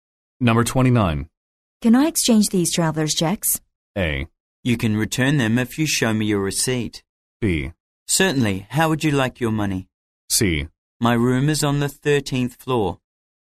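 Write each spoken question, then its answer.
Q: Can I exchange these traveler's checks?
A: B: Certainly. How would you like your money?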